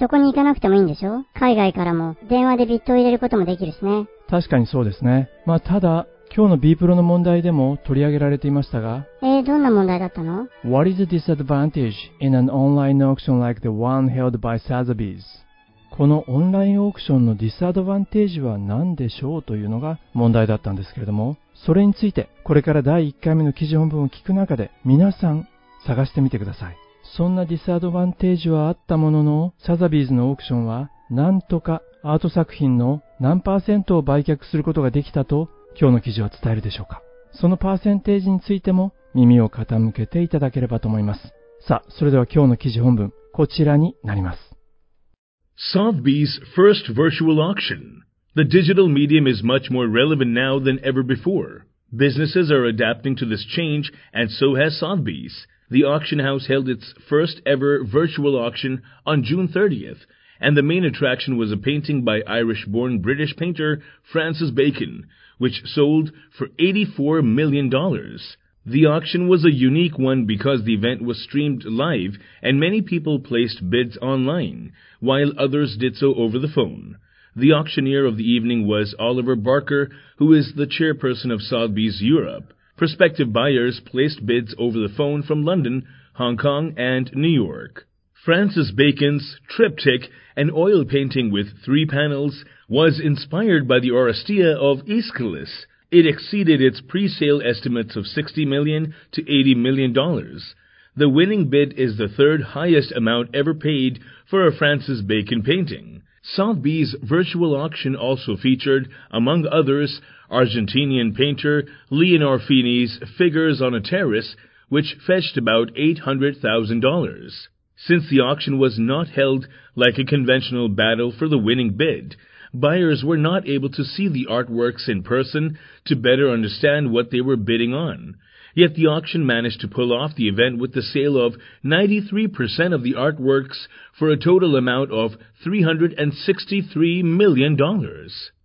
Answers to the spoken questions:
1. Since the auction was not held like a conventional battle for the winning bid, buyers were not able to see the artworks in person to better understand what they were bidding on.
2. アートワークの 93% を売り切ることができた。売却することができたんですね。